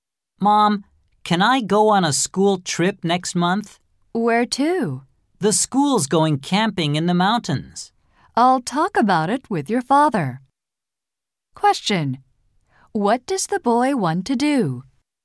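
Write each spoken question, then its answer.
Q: What does the boy want to do?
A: Go on a school camping trip in the mountains next month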